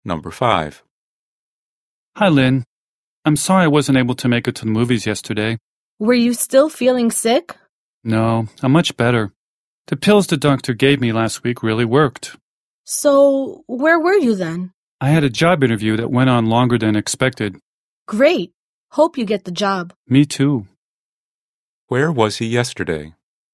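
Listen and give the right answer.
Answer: At a job interview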